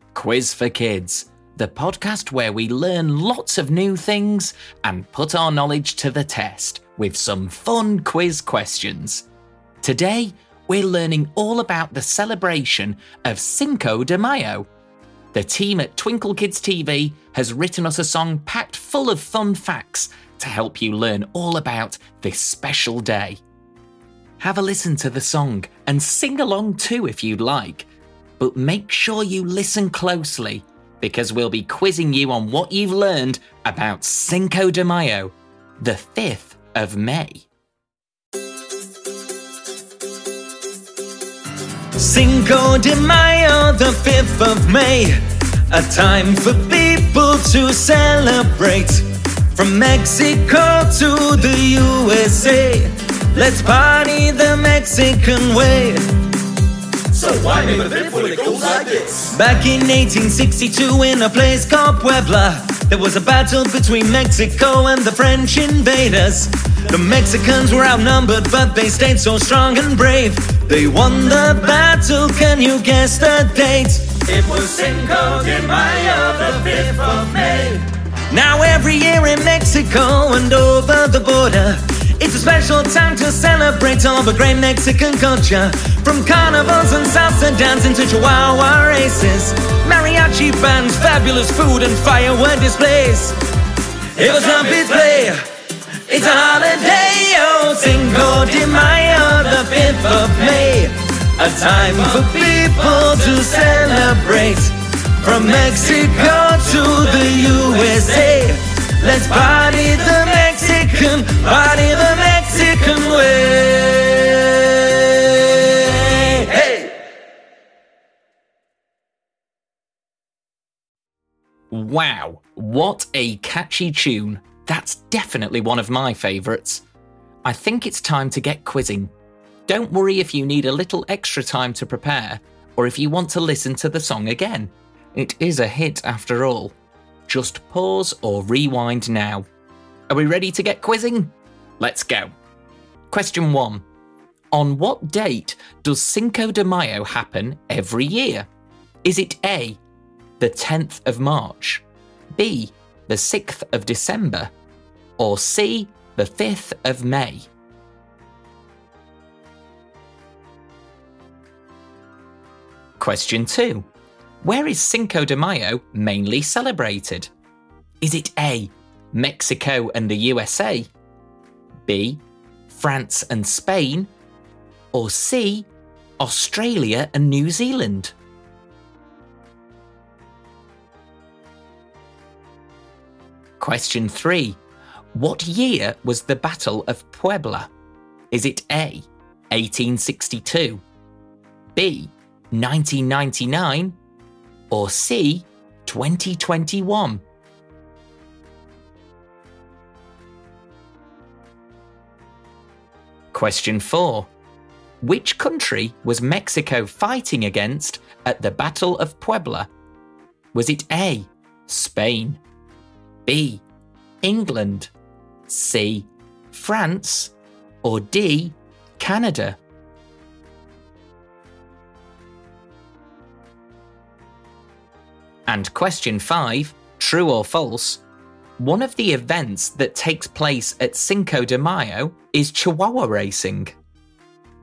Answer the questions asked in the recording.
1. The answer is C, the 5th of May.
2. The answer is A, Mexico and the USA.
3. It's A. The Battle of Puebla took place in 1862, when the French were invading Mexico.
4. You might have noticed the answer to this question already, but it is C, France.
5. This is true.